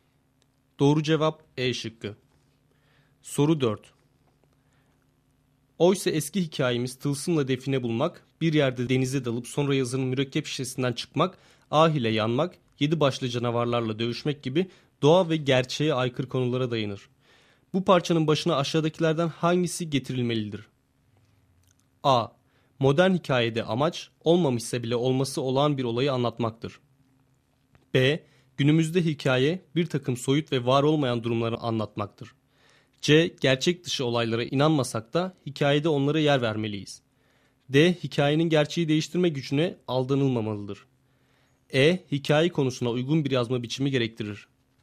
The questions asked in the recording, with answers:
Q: Bu parçanın başına aşağıdakilerden hangisi getirilmelidir?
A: Doğru cevap A şıkkı.